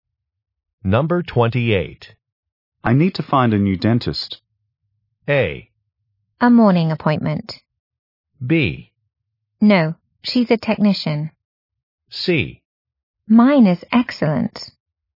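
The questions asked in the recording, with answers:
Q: I need to find a new dentist.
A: C: Mine is excellent.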